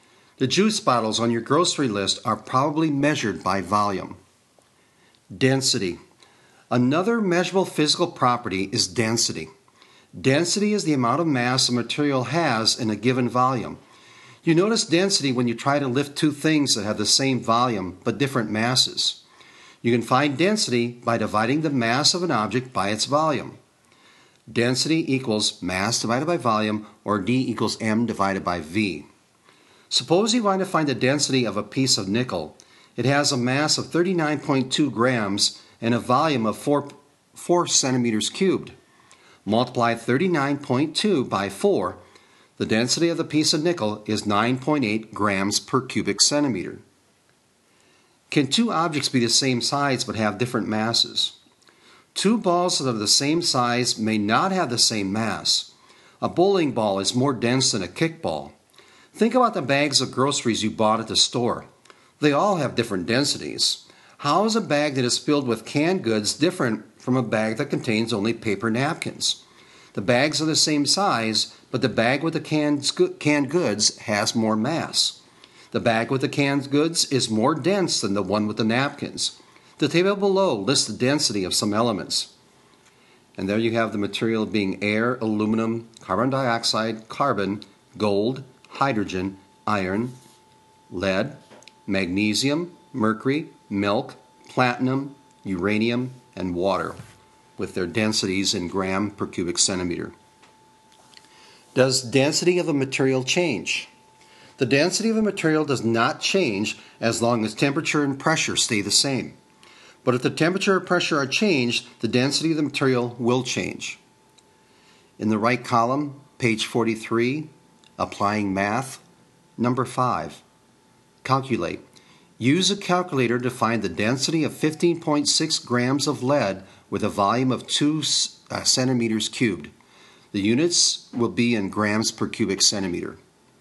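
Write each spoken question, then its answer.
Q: Use a calculator to find the density of 15.6 grams of lead with a volume of 2 centimeters cubed.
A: 7.8 grams per cubic centimeter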